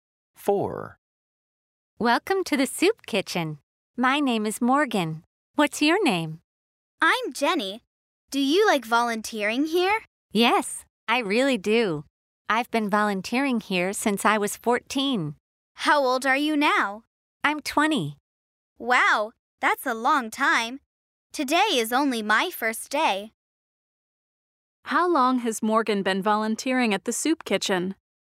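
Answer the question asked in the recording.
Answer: For 6 years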